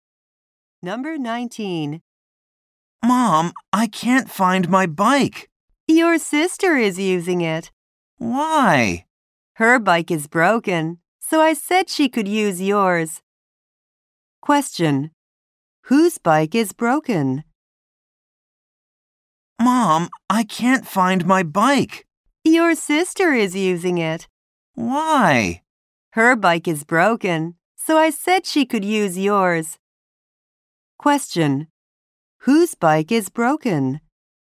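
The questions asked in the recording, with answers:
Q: Whose bike is broken?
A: His sister's.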